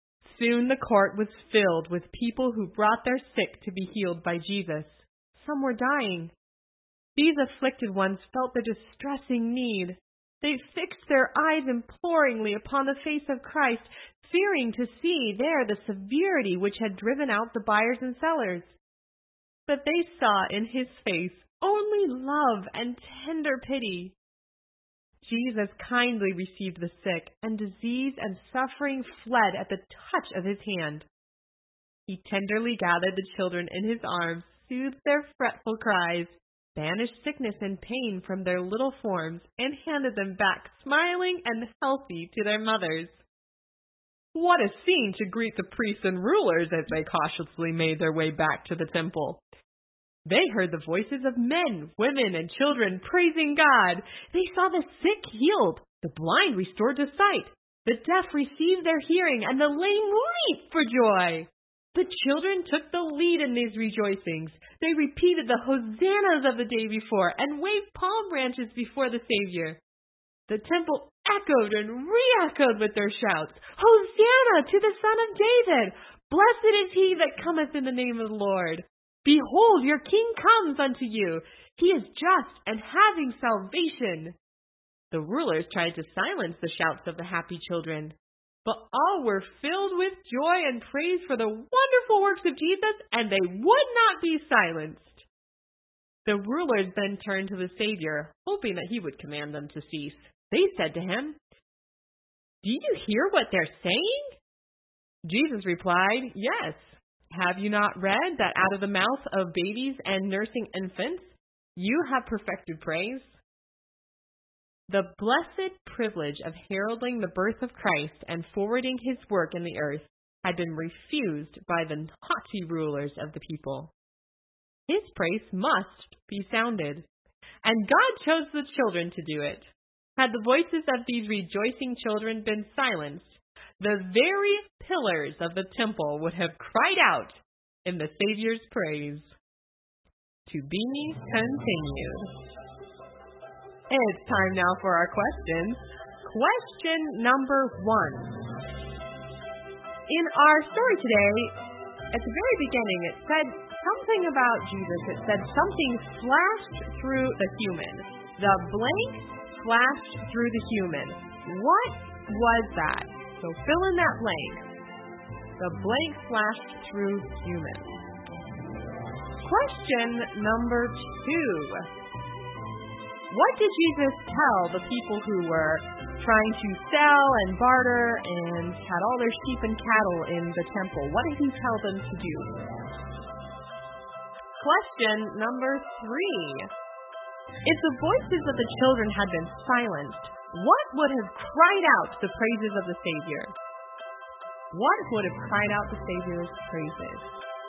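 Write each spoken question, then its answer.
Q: If the voices of the children had been silenced, what would have cried out the praises of the Savior?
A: the very pillars of the temple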